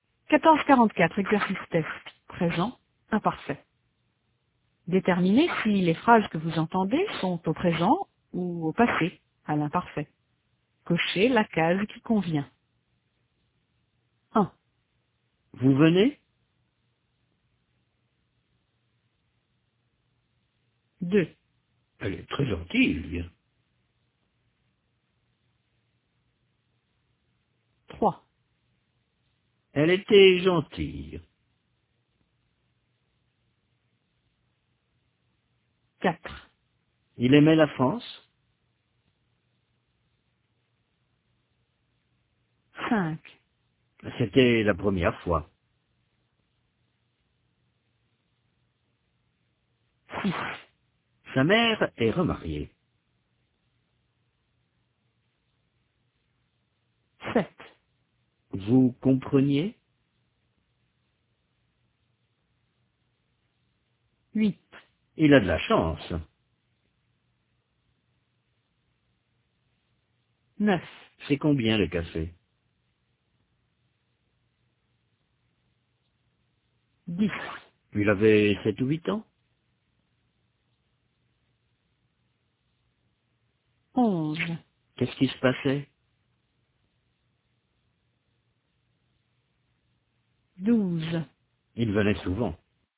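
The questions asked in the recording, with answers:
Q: Vous venez?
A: présent

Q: Elle est très gentille, il vient.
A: présent

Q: Elle était gentille.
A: imparfait

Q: Il aimait la France.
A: imparfait

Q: C'était la première fois.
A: imparfait

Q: Sa mère est remariée.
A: présent

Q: Vous compreniez?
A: imparfait

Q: Il a de la chance.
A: présent

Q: C'est combien le café?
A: présent

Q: Il avait 7 ou 8 ans?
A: imparfait

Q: Qu'est-ce qui se passait?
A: imparfait

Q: Il venait souvent.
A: imparfait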